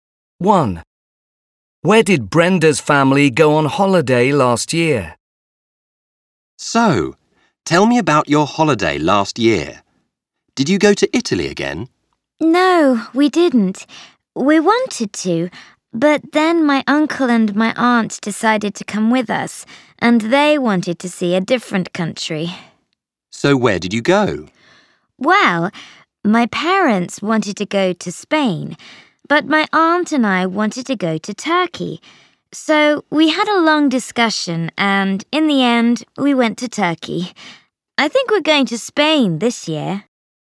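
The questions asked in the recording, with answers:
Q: Where did Brenda's family go on holiday last year?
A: Turkey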